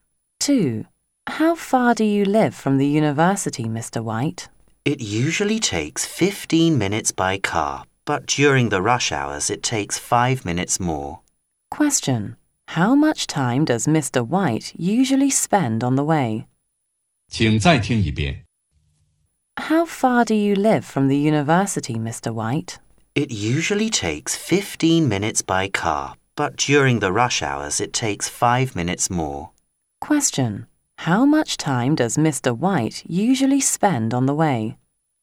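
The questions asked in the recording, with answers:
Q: How much time does Mr. White usually spend on the way?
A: 15 minutes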